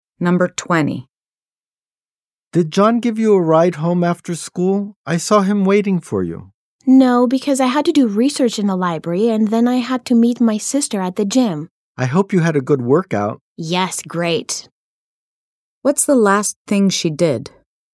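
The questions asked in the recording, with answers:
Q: What's the last thing she did?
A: She met her sister at the gym and worked out.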